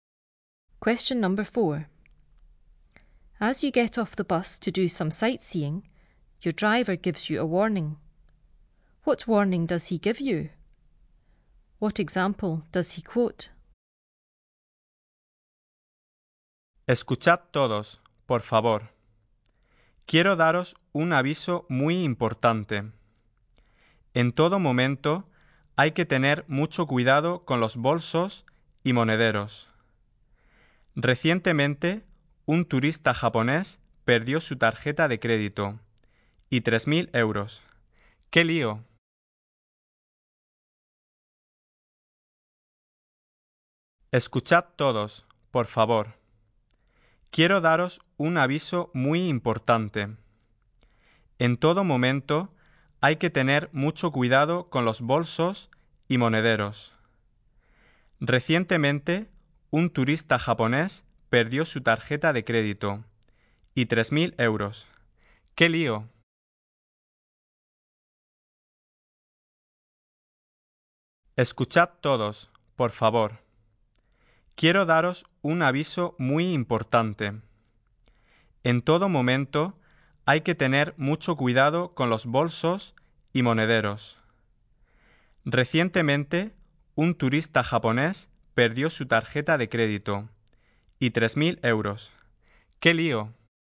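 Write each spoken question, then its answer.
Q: What warning does he give you?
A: Be very careful with your bags and purses at all times

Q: What example does he quote?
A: A Japanese tourist recently lost his credit card and 3,000 euros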